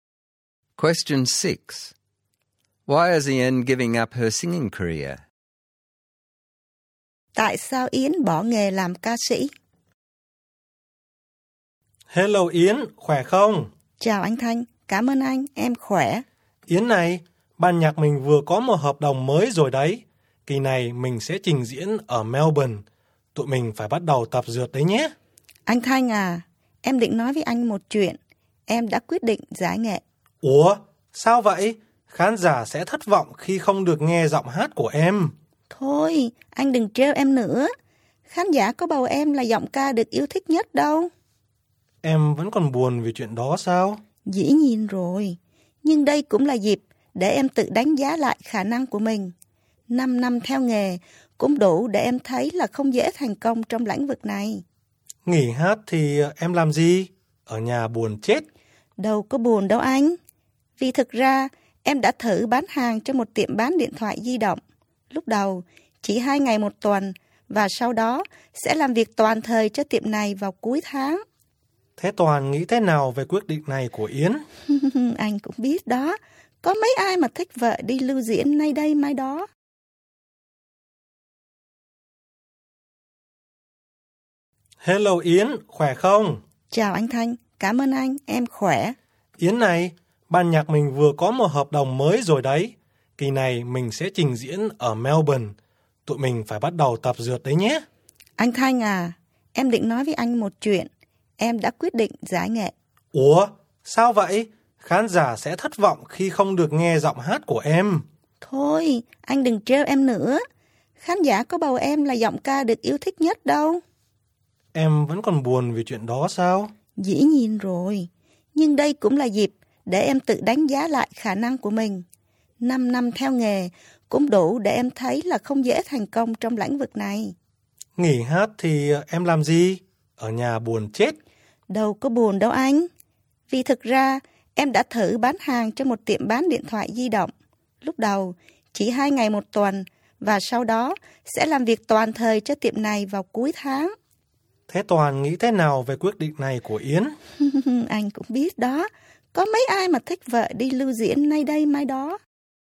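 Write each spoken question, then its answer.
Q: Why is Yen giving up her singing career?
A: She wasn't voted the most popular singer, and after 5 years she feels success in singing is hard. Her husband doesn't like her touring, and she has found a job selling mobile phones that will become full-time at the end of the month.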